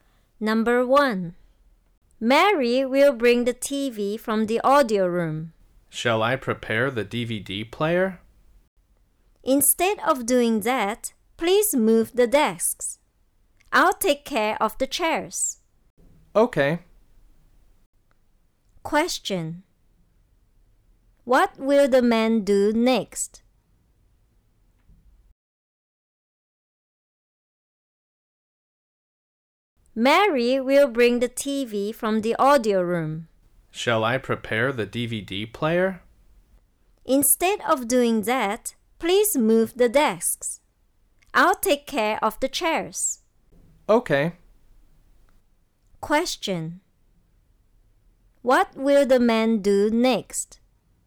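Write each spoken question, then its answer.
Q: What will the man do next?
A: He will move the desks.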